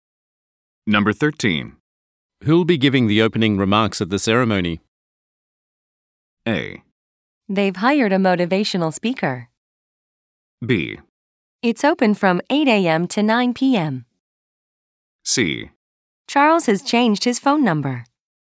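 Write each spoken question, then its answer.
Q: Who'll be giving the opening remarks at the ceremony?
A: A: They've hired a motivational speaker.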